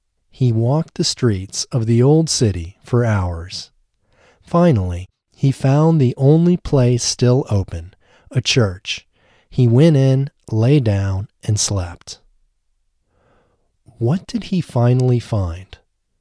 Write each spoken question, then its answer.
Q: What did he finally find?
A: He finally found a place still open, a church.